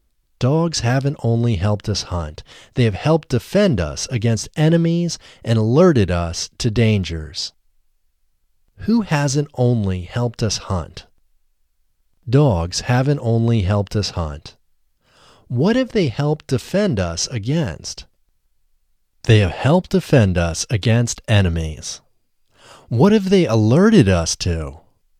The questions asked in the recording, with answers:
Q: Who hasn't only helped us hunt?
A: Dogs haven't only helped us hunt.

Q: What have they helped defend us against?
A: They have helped defend us against enemies.

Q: What have they alerted us to?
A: They have alerted us to dangers.